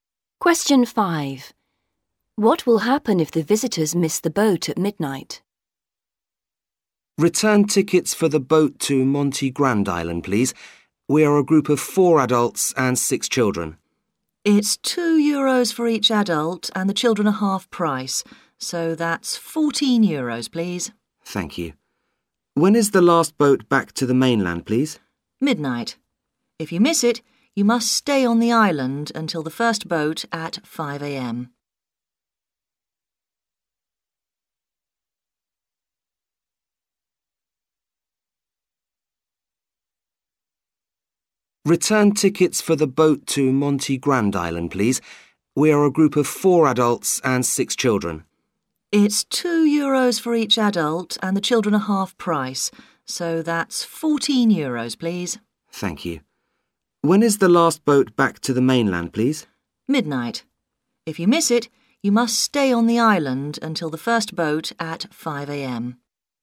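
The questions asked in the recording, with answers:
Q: What will happen if the visitors miss the boat at midnight?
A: They must stay on the island until the first boat at 5 a.m.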